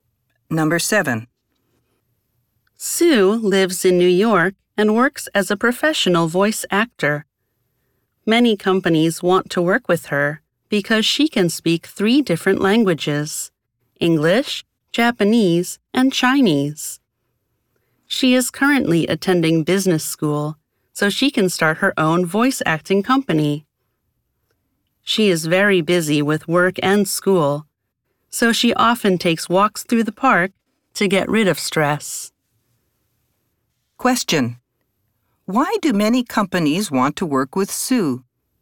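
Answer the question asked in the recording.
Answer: Because she can speak three languages: English, Japanese, and Chinese.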